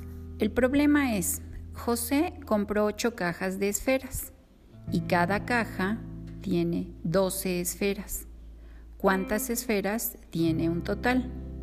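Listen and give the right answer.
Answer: 96 esferas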